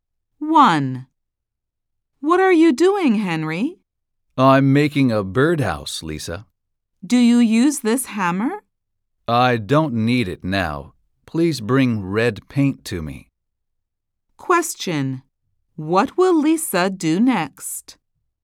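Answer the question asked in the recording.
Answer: Bring red paint to Henry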